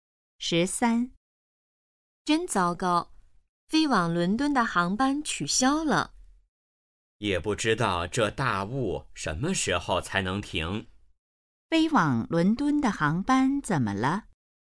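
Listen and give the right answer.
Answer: 因大雾取消了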